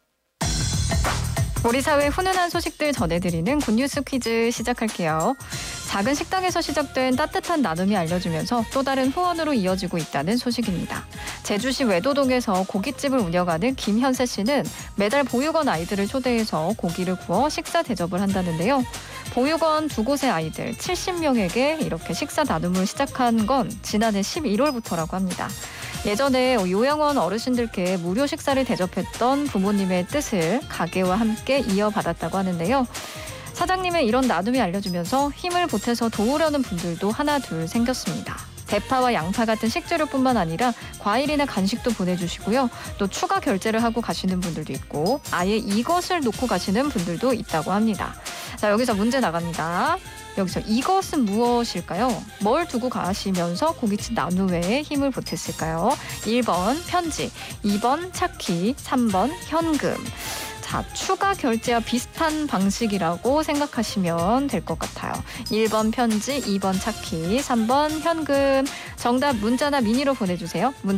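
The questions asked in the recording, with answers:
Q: 여기서 이것은 무엇일까요?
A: 3: 현금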